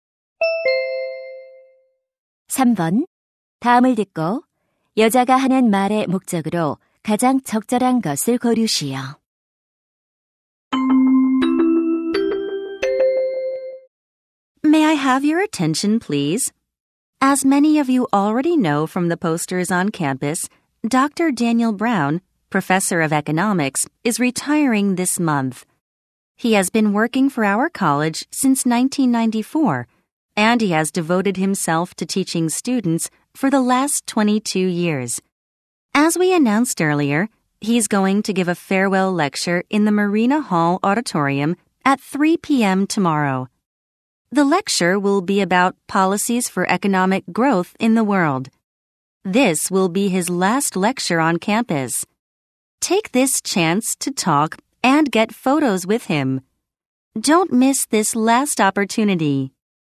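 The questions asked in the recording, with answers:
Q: 다음을 듣고 여자가 하는 말의 목적으로 가장 적절한 것을 고르시오.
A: 브라운 교수의 고별 강연을 알리려고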